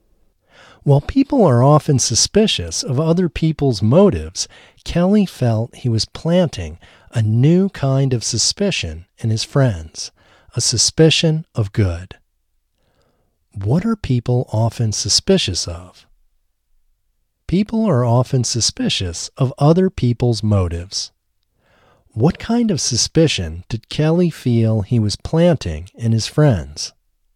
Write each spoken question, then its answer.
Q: What are people often suspicious of?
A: People are often suspicious of other people's motives.

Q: What kind of suspicion did Kelly feel he was planting in his friends?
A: Kelly felt he was planting a new kind of suspicion in his friends, a suspicion of good.